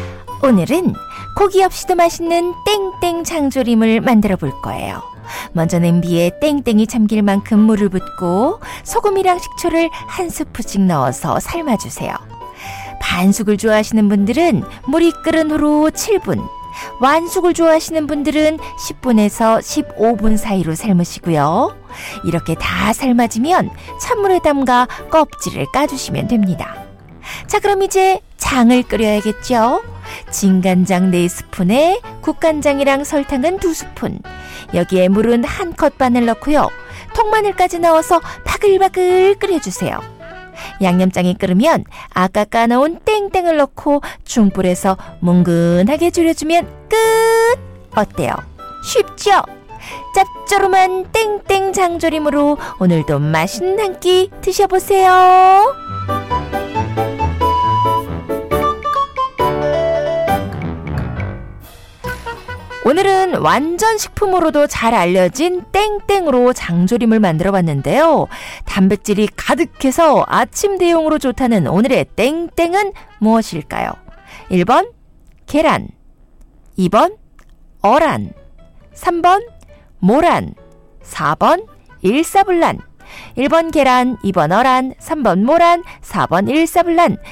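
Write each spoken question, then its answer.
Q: 단백질이 가득해서 아침 대용으로 좋다는 오늘의 땡땡은 무엇일까요?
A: 1: 계란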